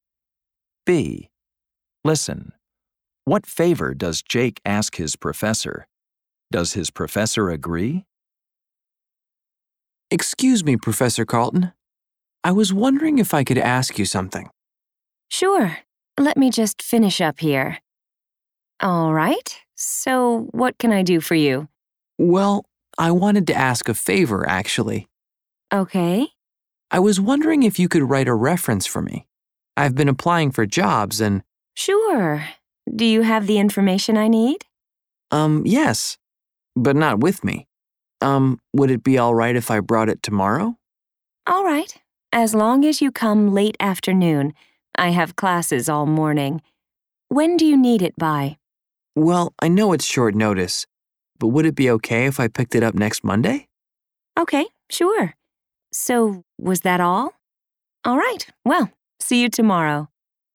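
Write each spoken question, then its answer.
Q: What favor does Jake ask his professor?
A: To write a reference for him

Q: Does his professor agree?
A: Yes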